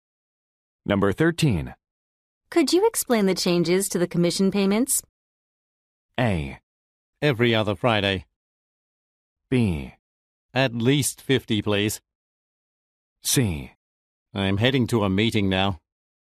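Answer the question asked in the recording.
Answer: C: I'm heading to a meeting now.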